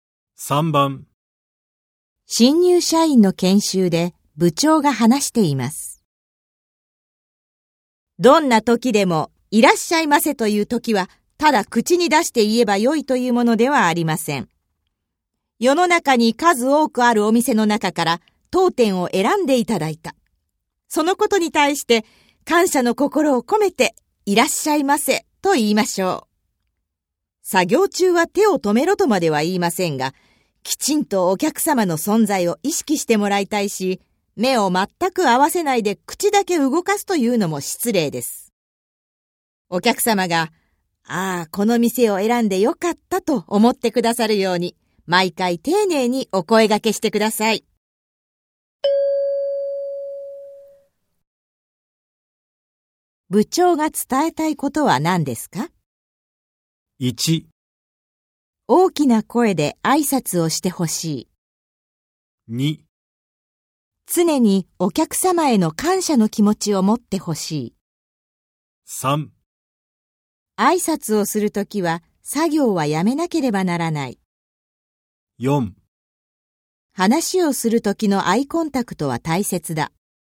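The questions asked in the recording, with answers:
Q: 部長が伝えたいことは何ですか?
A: 2: 常にお客様への感謝の気持ちを持ってほしい。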